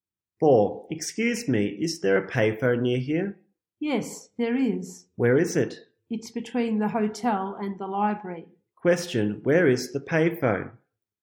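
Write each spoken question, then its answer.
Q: Question, where is the payphone?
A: Between the hotel and the library.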